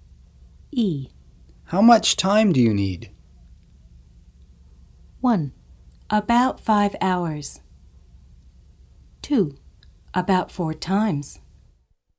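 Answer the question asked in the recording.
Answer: 1: About 5 hours.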